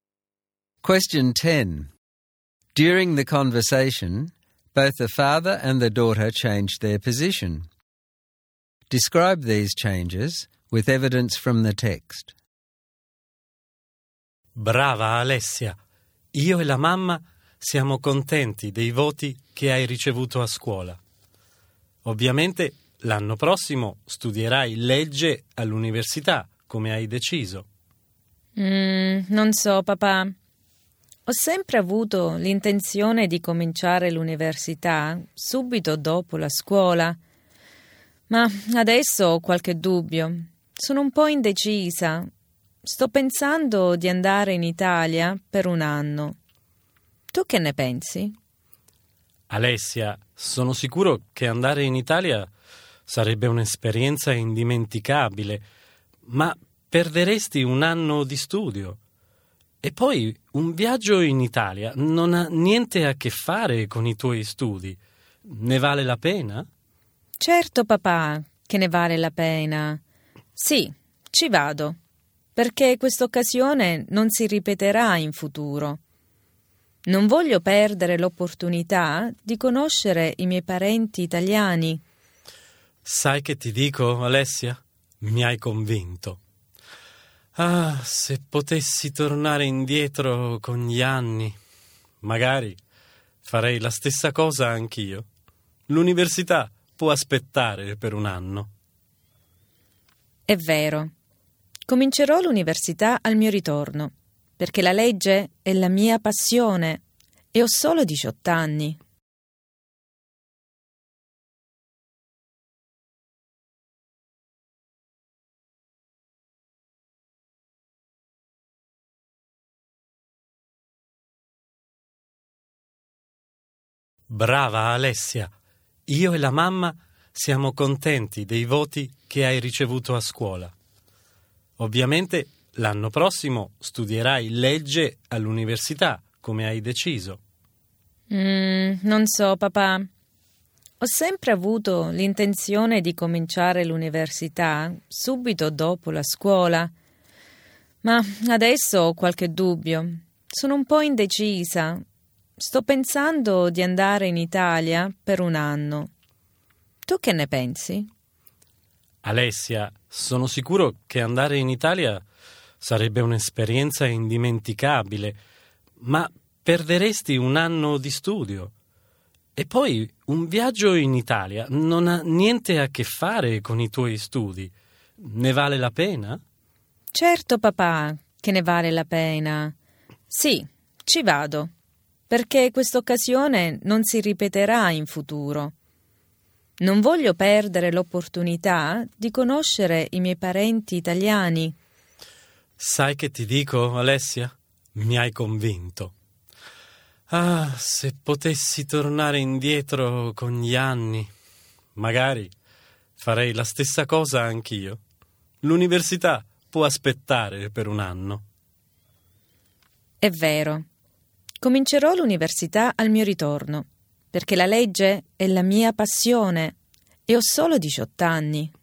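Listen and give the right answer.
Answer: Alessia first planned to start university straight after school but now wants to spend a year in Italy to meet her relatives. Her father first expected her to study law next year and objected that she would lose a year, but he is convinced and says university can wait a year.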